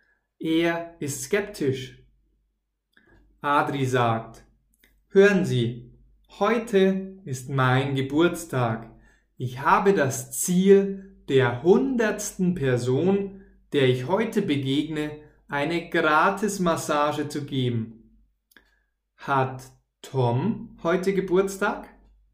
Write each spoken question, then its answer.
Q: Hat Tom heute Geburtstag?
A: Nein, Tom hat nicht Geburtstag, sondern Adri.